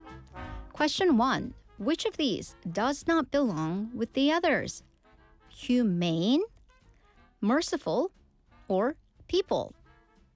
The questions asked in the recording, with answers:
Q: Which of these does not belong with the others?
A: So the answer was people.